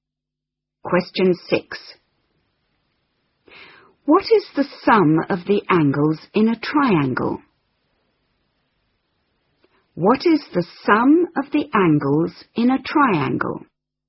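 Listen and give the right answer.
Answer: 180 degrees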